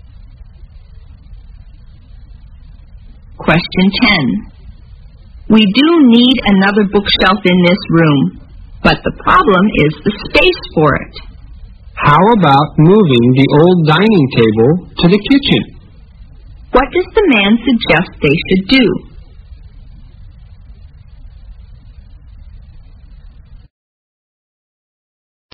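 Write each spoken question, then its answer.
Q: What does the man suggest they should do?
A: Move the old dining table to the kitchen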